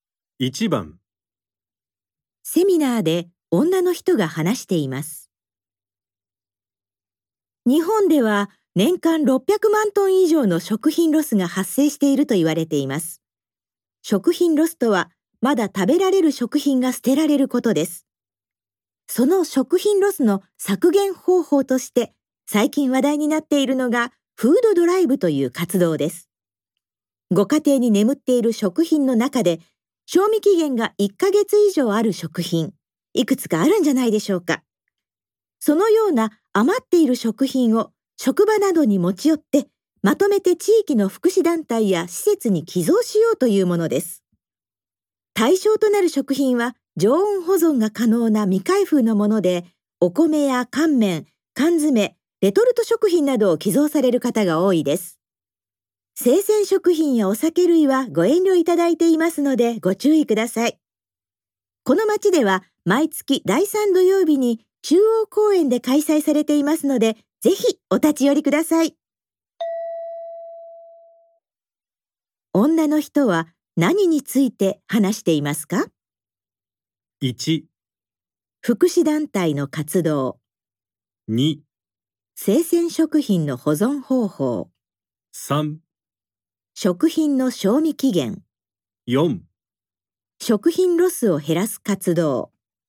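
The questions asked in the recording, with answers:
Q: 女の人は何について話していますか ?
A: 4: 食品ロスを減らす活動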